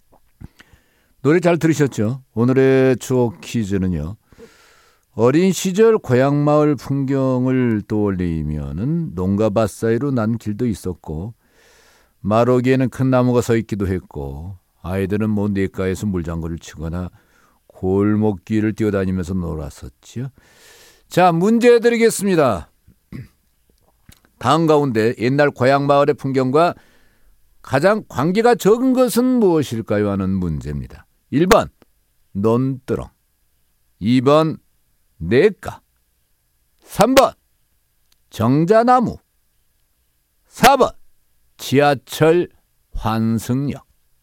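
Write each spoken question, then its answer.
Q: 다음 가운데 옛날 고향 마을의 풍경과 가장 관계가 적은 것은 무엇일까요?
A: 4: 지하철 환승역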